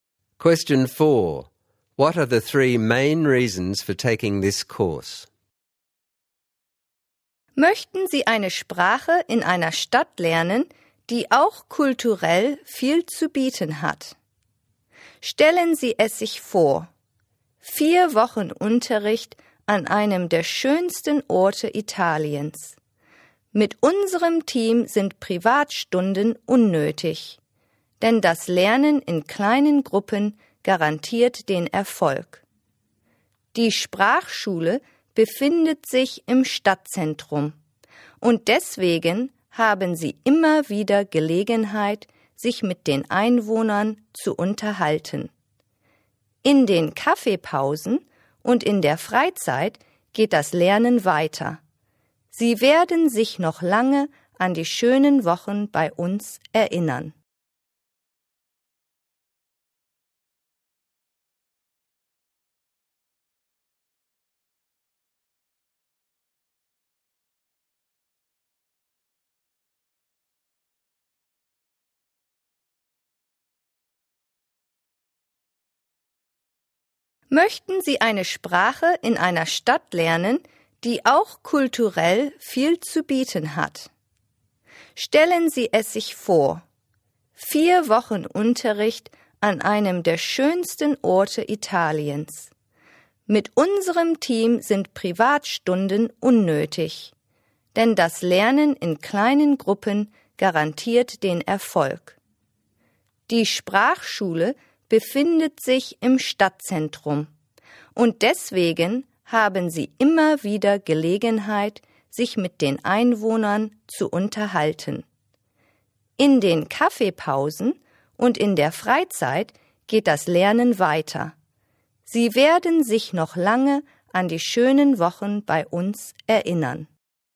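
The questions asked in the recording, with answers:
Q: What are the three main reasons for taking this course?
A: A culturally rich, beautiful Italian city; small-group learning that guarantees success; a school in the city centre with chances to talk to locals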